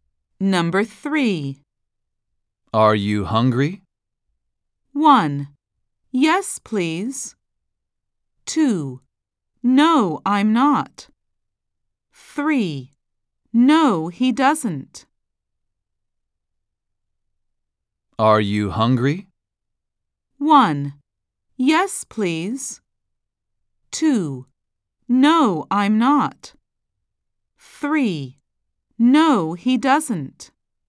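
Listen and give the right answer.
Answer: 2: No, I'm not.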